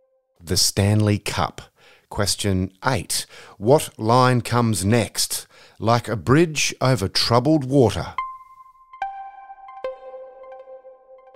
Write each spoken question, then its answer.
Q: What line comes next? Like a bridge over troubled water.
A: The first two choruses sing, "I will lay me down." And in the final chorus, they sing, "I will ease your mind,"